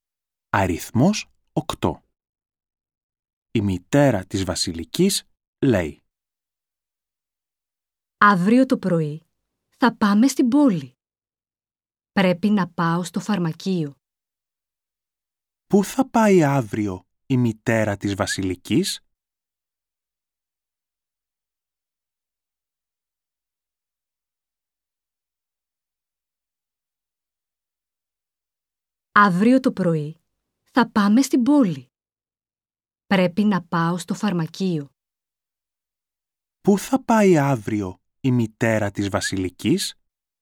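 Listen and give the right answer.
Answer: Στο φαρμακείο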